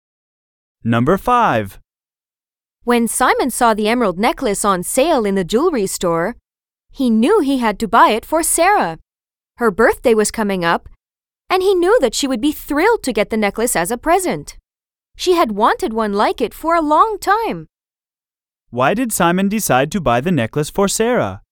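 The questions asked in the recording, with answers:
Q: Why did Simon decide to buy the necklace for Sarah?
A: Because it was for her birthday and she had wanted one like it for a long time.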